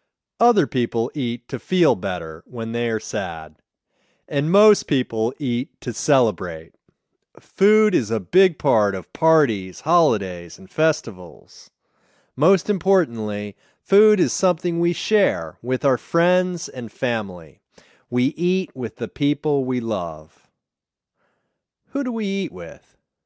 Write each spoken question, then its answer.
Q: Who do we eat with?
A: We eat with our friends and family.